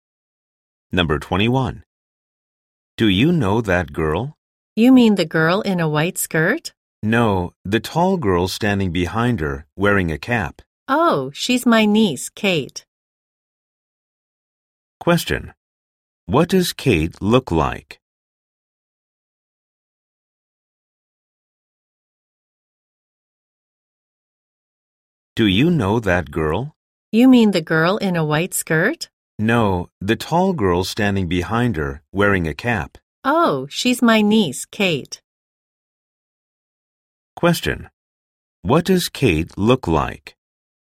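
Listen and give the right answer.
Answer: She is tall and wearing a cap.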